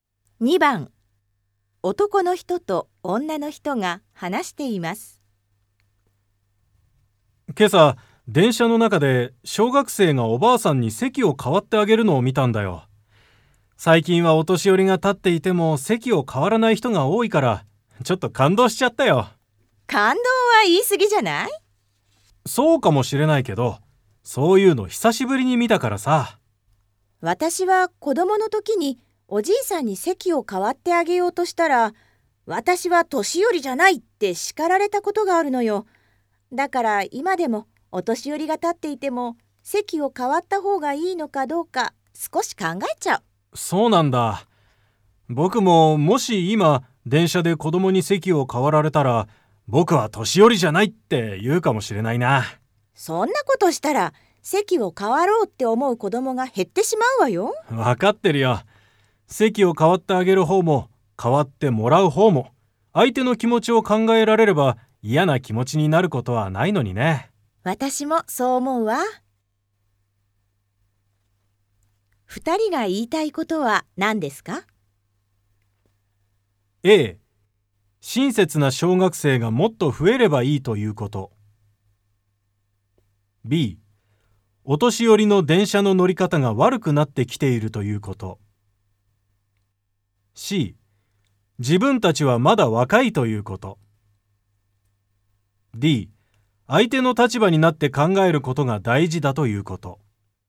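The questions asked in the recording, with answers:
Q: 二人が言いたいことは何ですか?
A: D: 相手の立場になって考えることが大事だということ。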